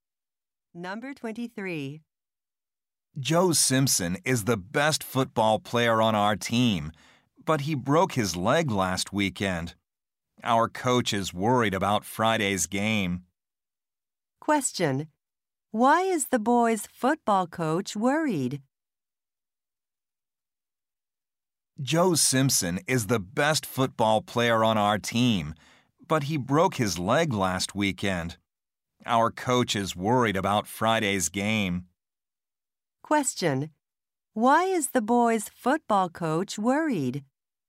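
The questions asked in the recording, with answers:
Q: Why is the boy's football coach worried?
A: The best player broke his leg.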